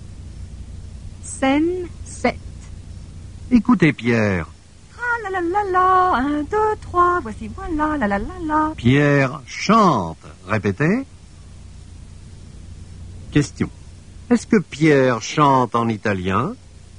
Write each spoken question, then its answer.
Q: Est-ce que Pierre chante en italien?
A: Non, Pierre ne chante pas en italien.